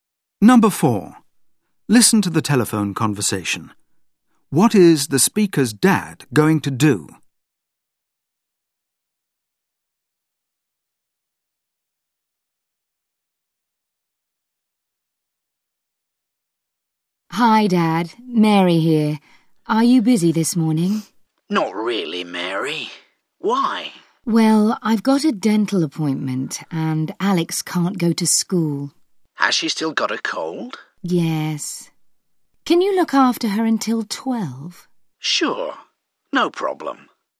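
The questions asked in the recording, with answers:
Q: What is the speaker's dad going to do?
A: Look after Alex until 12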